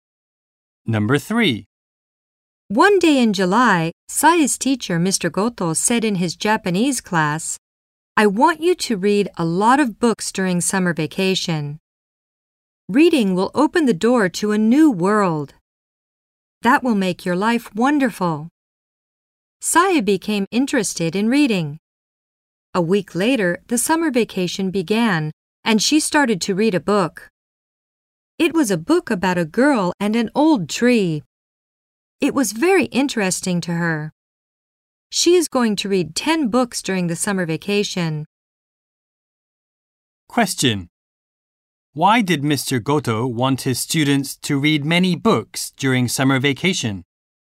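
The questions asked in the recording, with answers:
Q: Why did Mr. Goto want his students to read many books during summer vacation?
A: Because reading will open the door to a new world and make their lives wonderful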